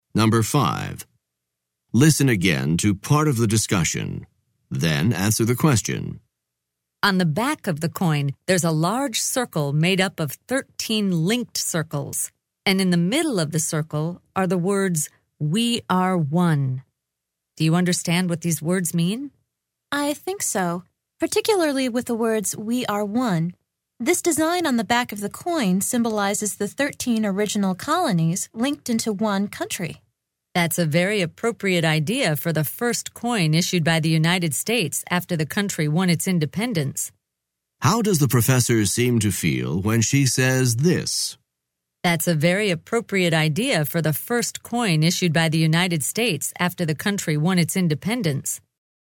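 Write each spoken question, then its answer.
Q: How does the professor seem to feel when she says this?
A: She approves of the design; she thinks it is a fitting symbol for the first U.S. coin.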